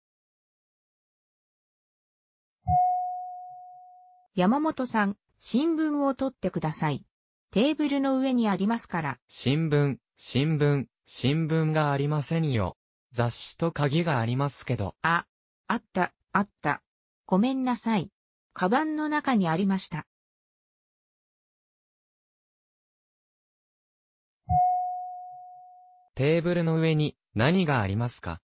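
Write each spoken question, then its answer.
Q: テーブルの上に何がありますか?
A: 雑誌と鍵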